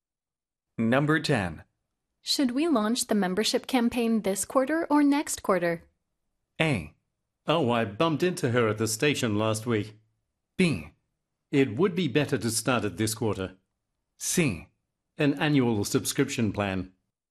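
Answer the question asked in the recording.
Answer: B: It would be better to start it this quarter.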